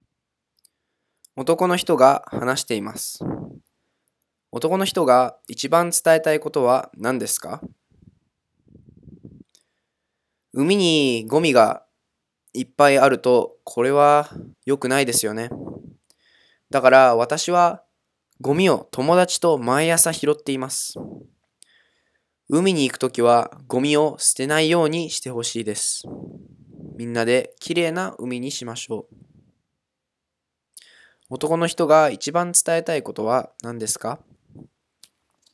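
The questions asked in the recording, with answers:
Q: 男の人が一番伝えたいことは何ですか?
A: 海に行くときはゴミを捨てないでほしい(みんなで海をきれいにしよう)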